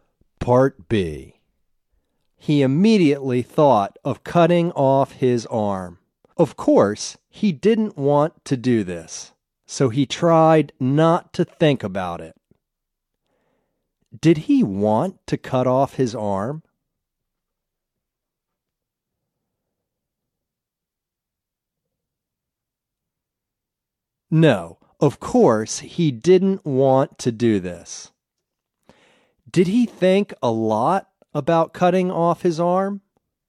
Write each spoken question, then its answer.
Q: Did he want to cut off his arm?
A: No, of course, he didn't want to do this.

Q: Did he think a lot about cutting off his arm?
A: No, he tried not to think about it.